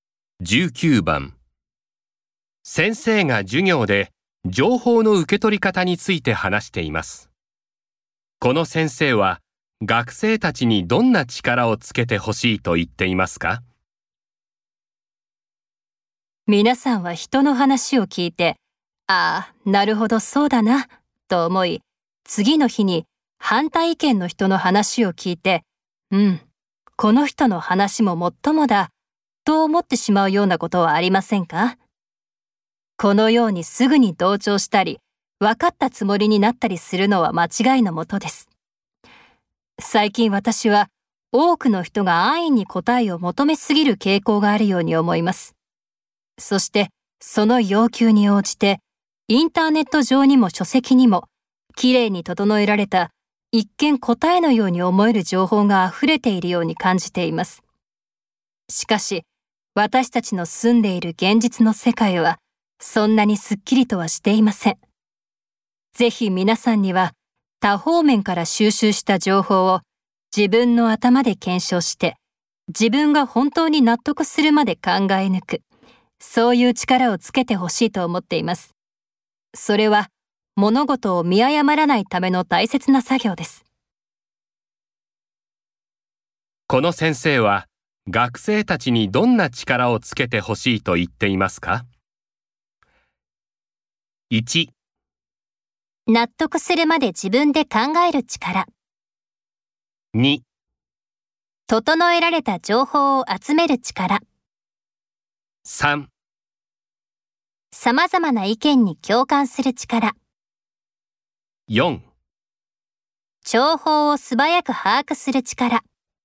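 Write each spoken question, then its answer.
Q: この先生は、学生たちにどんな力をつけてほしいと言っていますか?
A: 1: 納得するまで自分で考える力。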